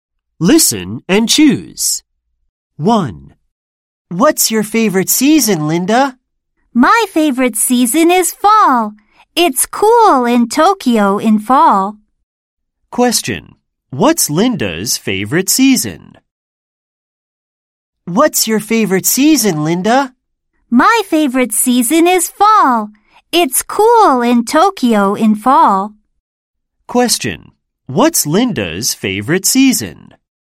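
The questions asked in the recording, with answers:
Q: What's Linda's favorite season?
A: fall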